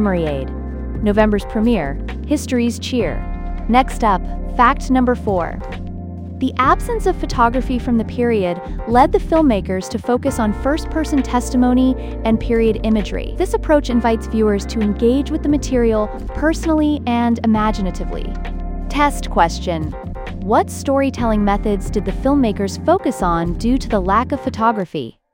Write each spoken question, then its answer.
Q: What storytelling methods did the filmmakers focus on due to the lack of photography?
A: First-person testimony and period imagery.